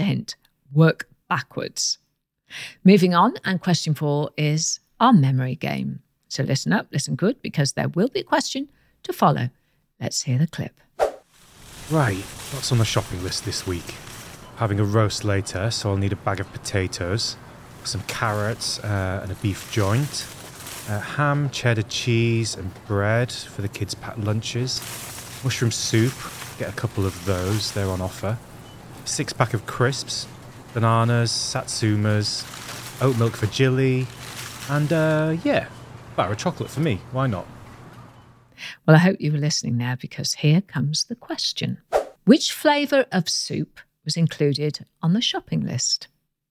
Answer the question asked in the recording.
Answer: The answer I was looking for was mushroom soup.